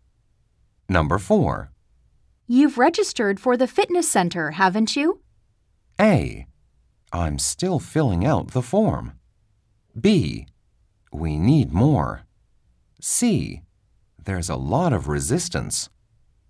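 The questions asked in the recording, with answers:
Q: You've registered for the fitness center, haven't you?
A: A: I'm still filling out the form.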